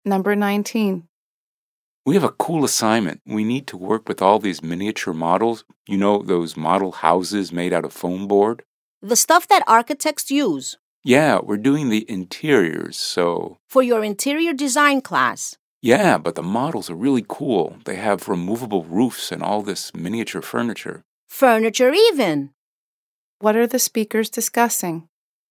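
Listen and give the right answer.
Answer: An interior design class assignment using miniature model houses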